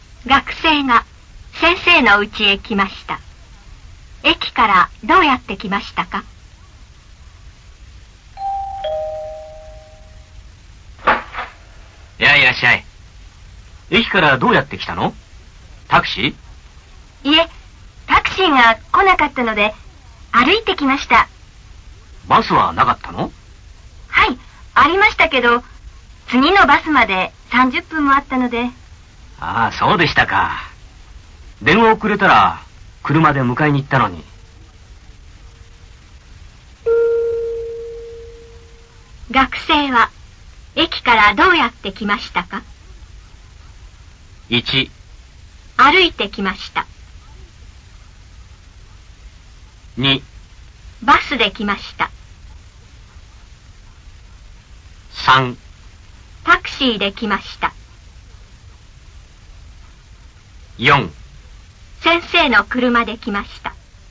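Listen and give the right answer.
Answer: 1: 歩いて来ました。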